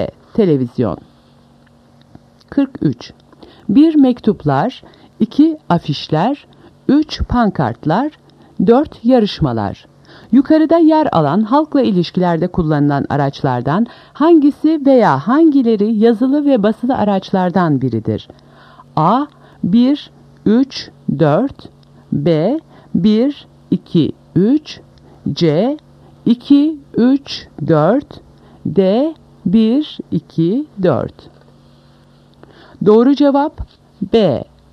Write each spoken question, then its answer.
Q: Yukarıda yer alan halkla ilişkilerde kullanılan araçlardan hangisi veya hangileri yazılı ve basılı araçlardan biridir?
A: Doğru cevap B. 1, 2, 3.